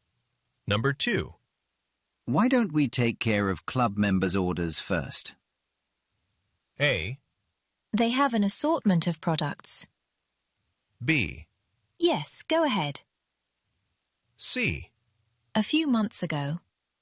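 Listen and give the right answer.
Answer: B: Yes, go ahead.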